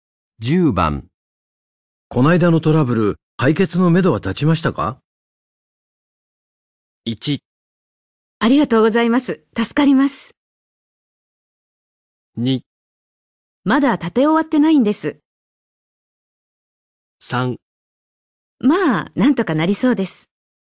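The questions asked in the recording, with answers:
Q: こないだのトラブル、解決のめどは立ちましたか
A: 3: まあ、なんとかなりそうです。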